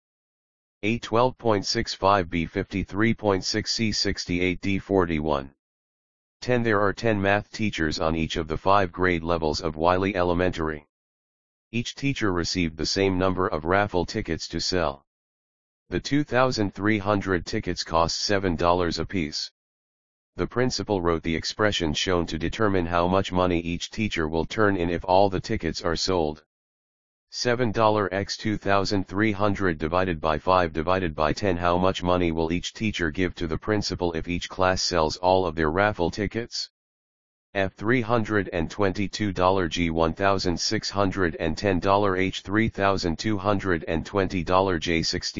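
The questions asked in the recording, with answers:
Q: How much money will each teacher give to the principal if each class sells all of their raffle tickets?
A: F: $322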